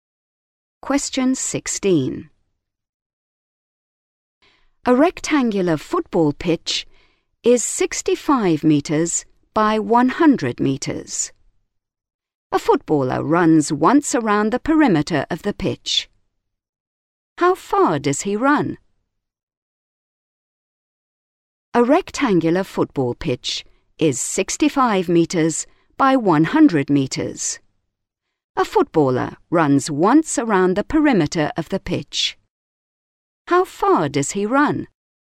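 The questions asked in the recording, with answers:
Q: How far does he run?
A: 330 metres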